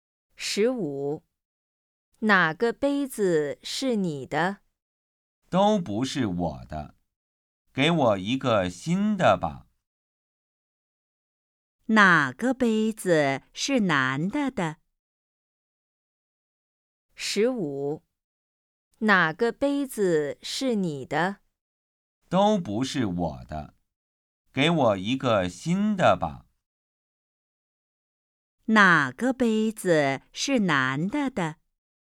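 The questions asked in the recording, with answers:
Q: 哪个杯子是男的的?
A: 都不是他的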